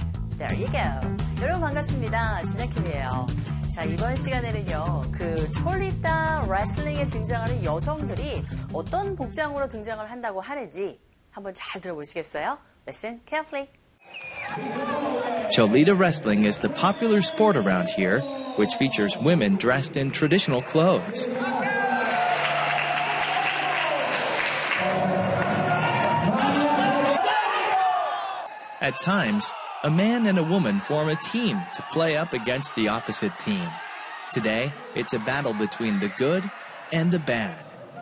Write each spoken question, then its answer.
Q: 그 촐리따 레슬링에 등장하는 여성들이 어떤 복장으로 등장을 한다고 하는지 한번 잘 들어보시겠어요?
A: 전통 의상을 입고 등장을 한다고 하네요.